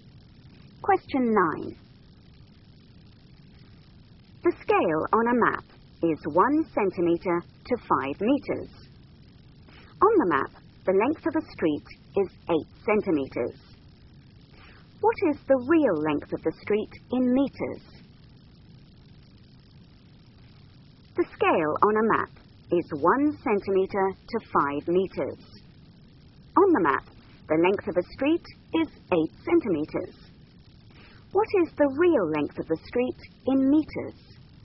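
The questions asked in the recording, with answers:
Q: What is the real length of the street in meters?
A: 40 meters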